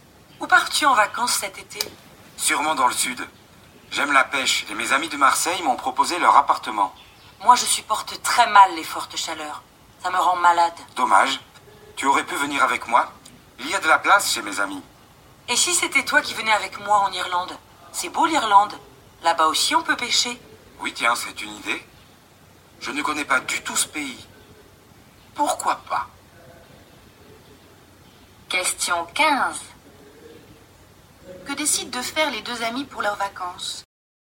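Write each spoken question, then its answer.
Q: Que décident de faire les deux amis pour leurs vacances?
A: Partir ensemble en Irlande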